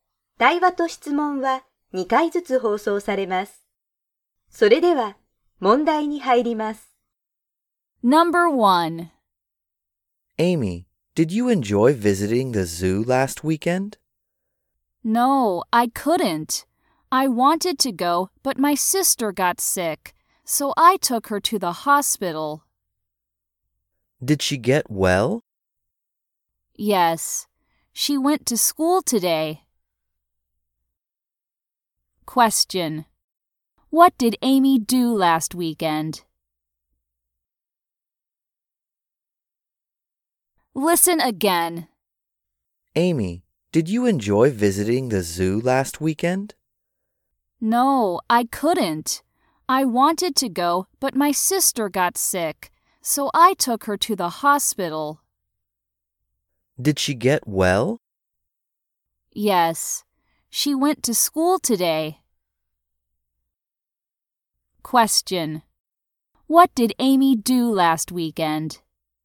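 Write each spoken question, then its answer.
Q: What did Amy do last weekend?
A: She took her sister to the hospital.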